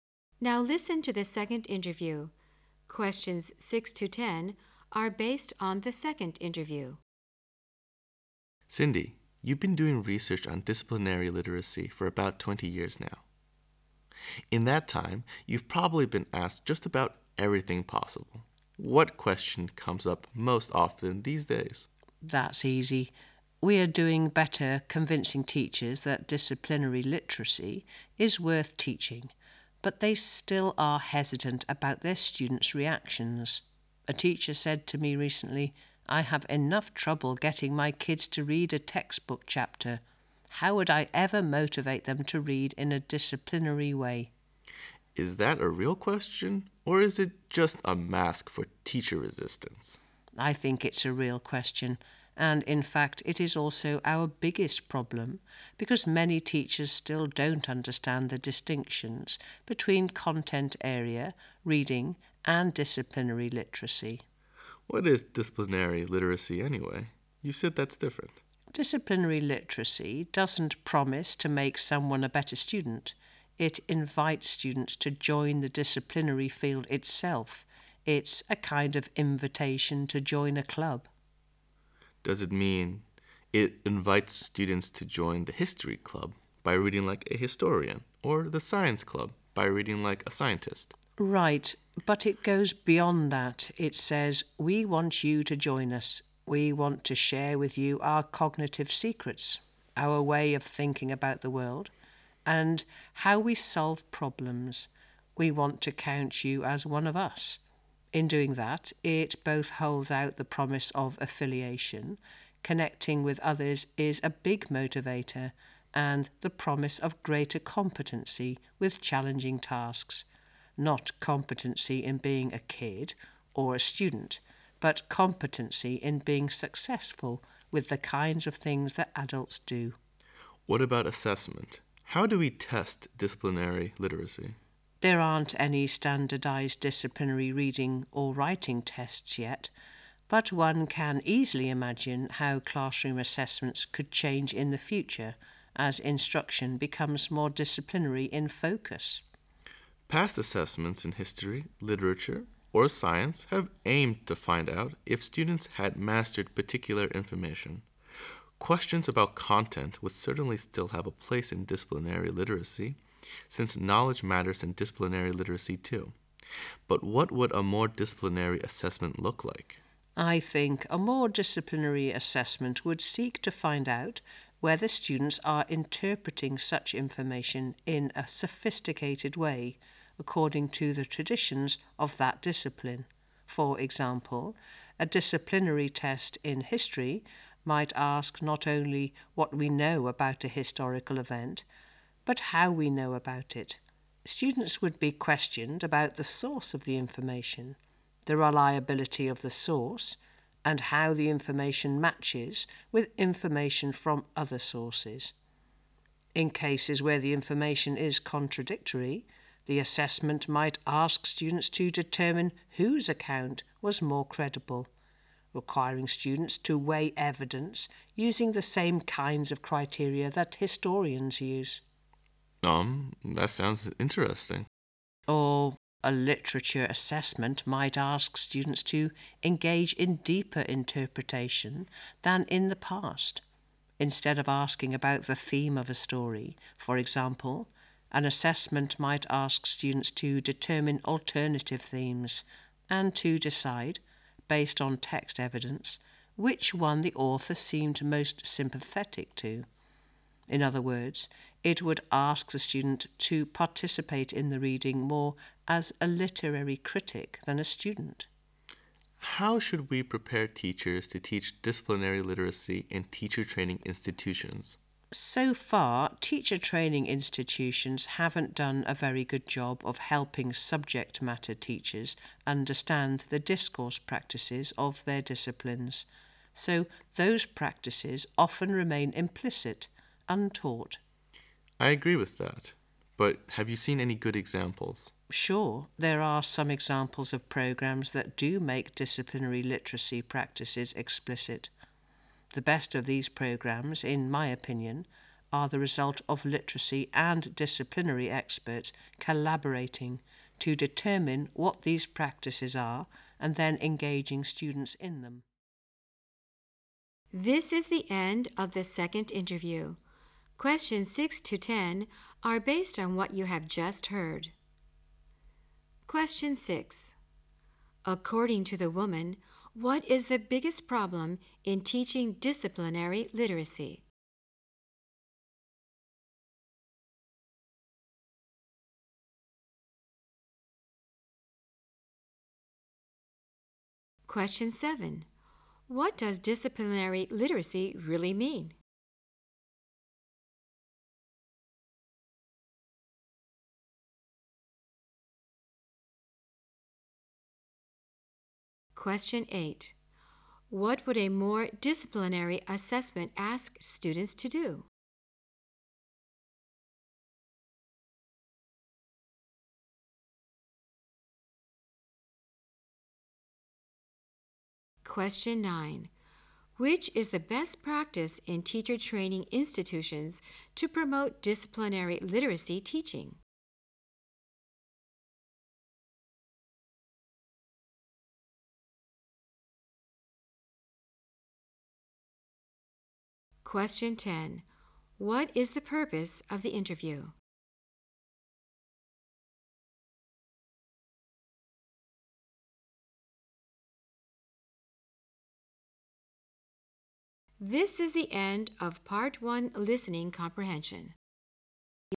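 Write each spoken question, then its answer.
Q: According to the woman, what is the biggest problem in teaching disciplinary literacy?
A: Many teachers don't understand the difference between content area reading and disciplinary literacy

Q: What does disciplinary literacy really mean?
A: Inviting students to join the disciplinary field and think like its experts

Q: What would a more disciplinary assessment ask students to do?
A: Interpret information in a sophisticated way according to the traditions of the discipline

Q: Which is the best practice in teacher training institutions to promote disciplinary literacy teaching?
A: Literacy and disciplinary experts collaborating to identify the practices and engage students in them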